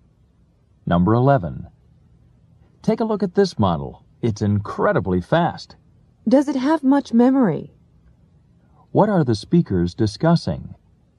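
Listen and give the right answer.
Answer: A computer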